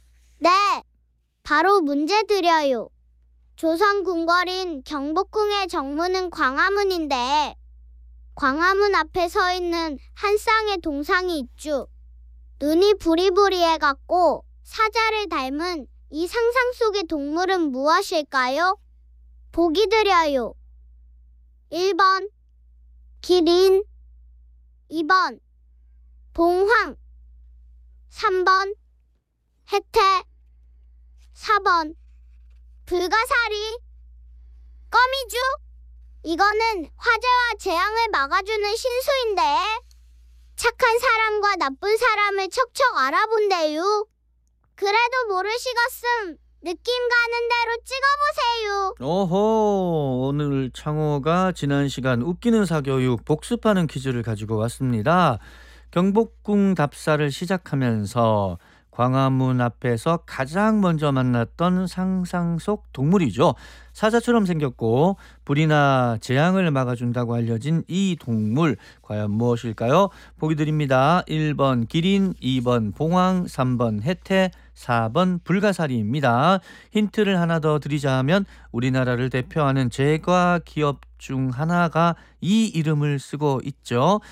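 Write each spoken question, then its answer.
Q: 눈이 부리부리해갖고 사자를 닮은 이 상상 속의 동물은 무엇일까요?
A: 3번: 해태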